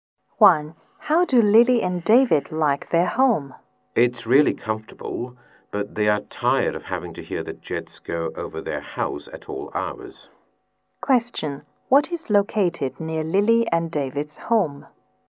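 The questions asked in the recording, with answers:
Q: What is located near Lily and David's home?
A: An airport (jets fly over their house)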